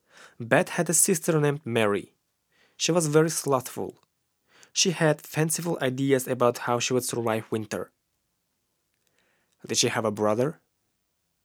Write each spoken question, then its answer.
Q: Did she have a brother?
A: No, she didn't have a brother.